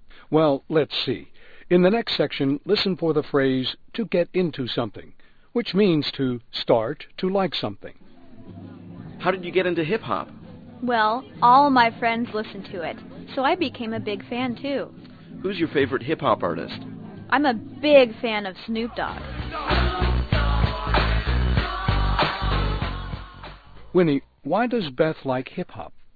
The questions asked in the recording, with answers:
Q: Winnie, why does Beth like hip-hop?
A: 她说她喜欢上嘻哈乐啊,是因为她的朋友都爱听这种音乐